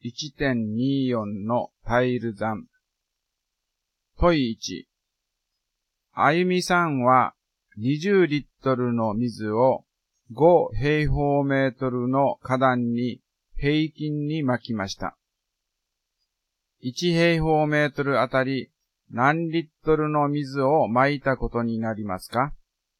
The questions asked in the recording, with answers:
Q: 1平方メートルあたり何リットルの水を撒いたことになりますか?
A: 式は 20÷5 で1平方メートルあたり4リットルになりますね